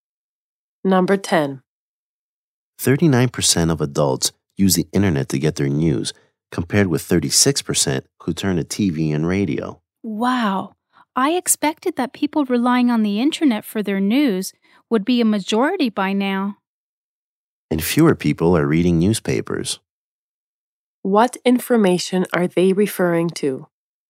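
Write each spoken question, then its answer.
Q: What information are they referring to?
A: Where adults get their news (39% use the internet, 36% TV and radio)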